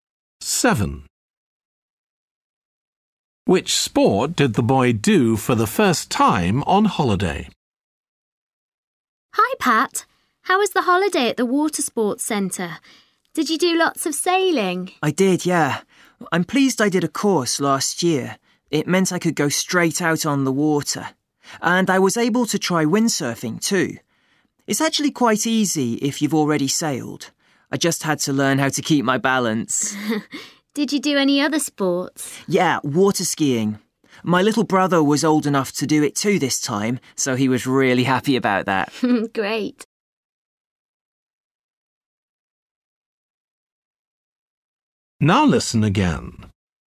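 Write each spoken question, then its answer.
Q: Which sport did the boy do for the first time on holiday?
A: windsurfing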